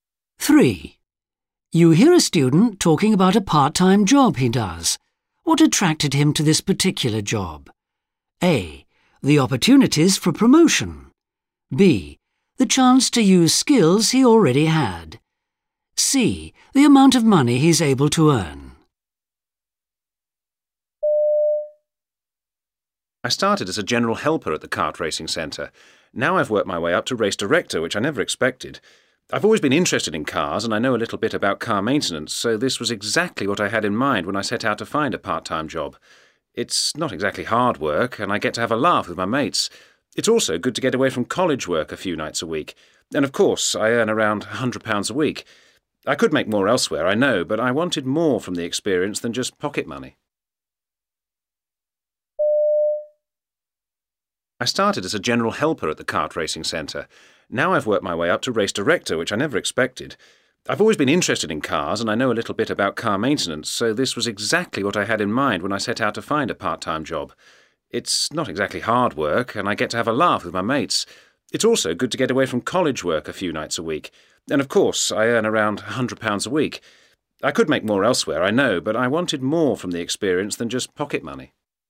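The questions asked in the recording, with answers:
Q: What attracted him to this particular job?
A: B: The chance to use skills he already had.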